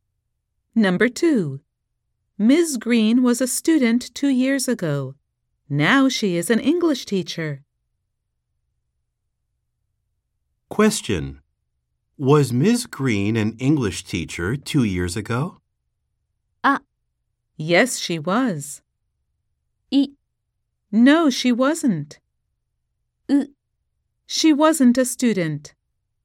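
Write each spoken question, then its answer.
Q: Was Ms. Green an English teacher 2 years ago?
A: B: No, she wasn't.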